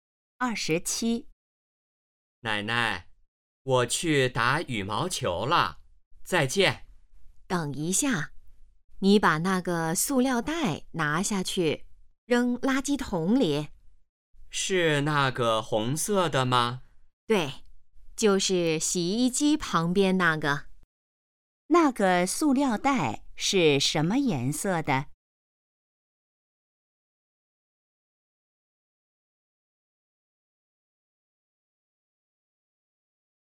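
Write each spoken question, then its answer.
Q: 那个塑料袋是什么颜色的?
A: 红色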